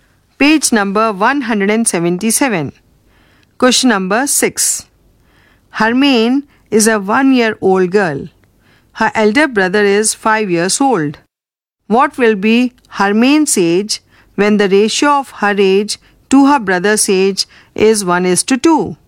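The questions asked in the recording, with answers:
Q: What will be Hermaine's age when the ratio of her age to her brother's age is 1:2?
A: 4 years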